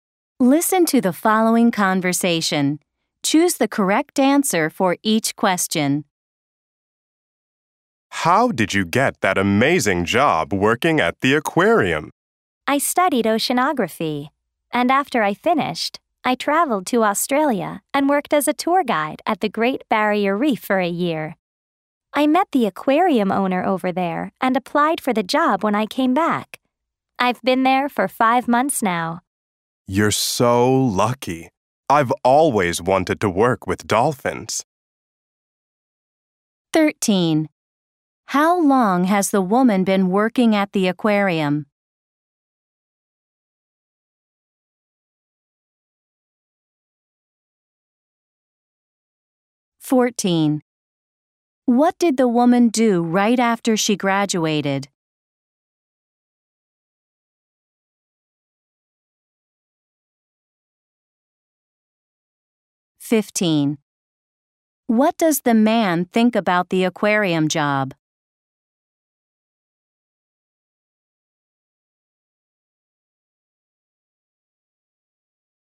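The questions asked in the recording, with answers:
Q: How long has the woman been working at the aquarium?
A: 5 months

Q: What did the woman do right after she graduated?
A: She went to Australia and worked as a tour guide at the Great Barrier Reef

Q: What does the man think about the aquarium job?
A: He thinks she is lucky; he has always wanted to work with dolphins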